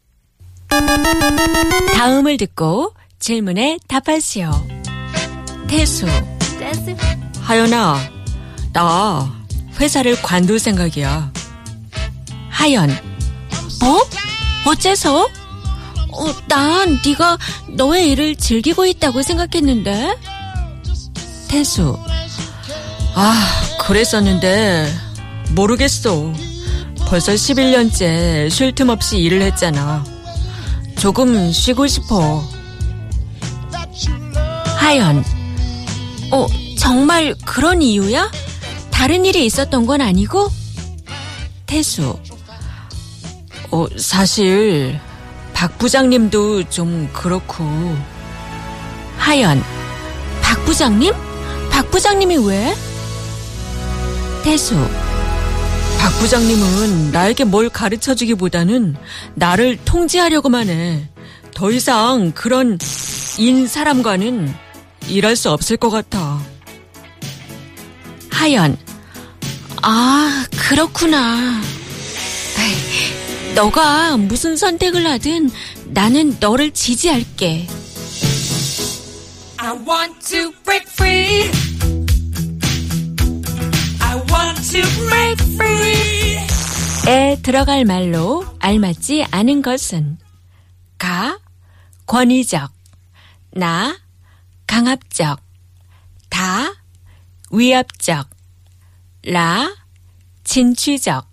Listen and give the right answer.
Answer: 라, 진취적, adventurous, and enterprising.